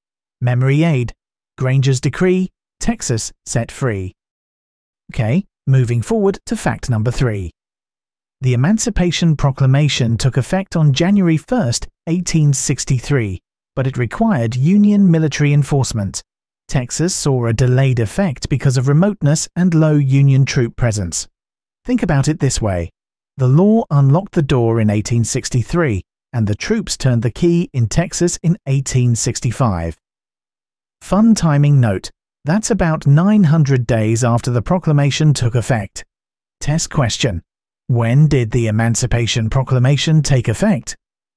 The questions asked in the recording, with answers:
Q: When did the Emancipation Proclamation take effect?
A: January 1, 1863.